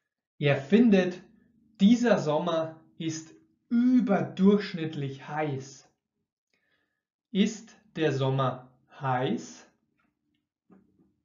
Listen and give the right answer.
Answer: Ja, der Sommer ist heiß so richtig brütend heiß.